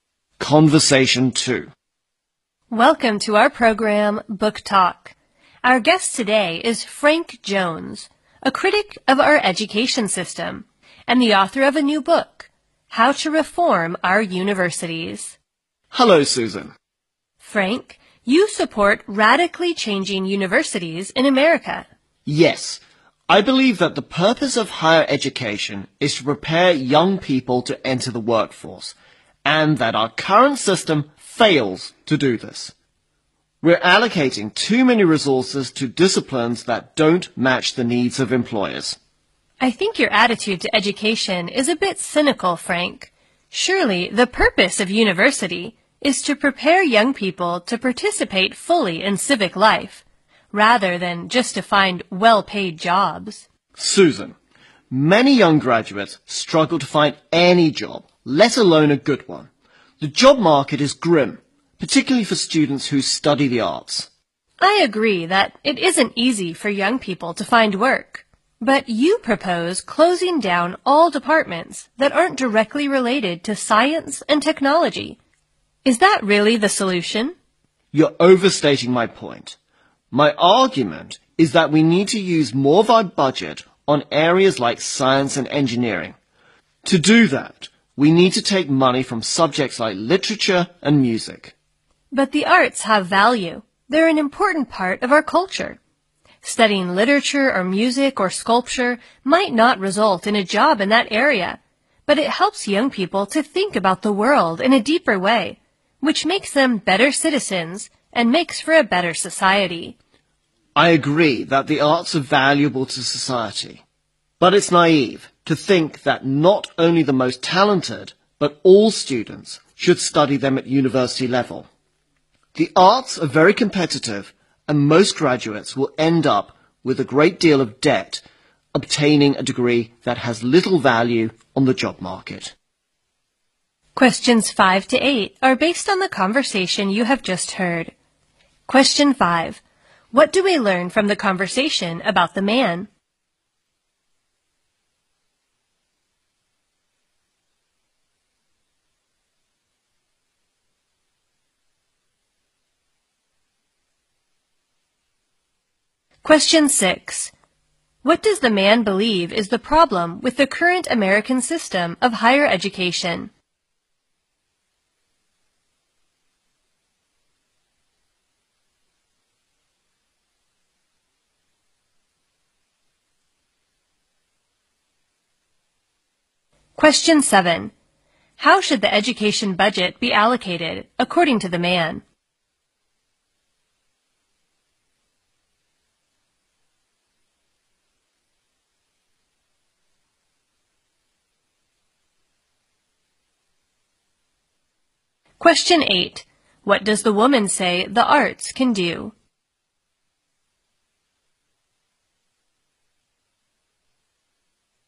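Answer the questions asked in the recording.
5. He is a critic of the education system who wrote a book on reforming universities.
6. It fails to prepare young people for the workforce.
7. More to science and engineering, taking money from subjects like literature and music.
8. Help young people think about the world more deeply and make them better citizens.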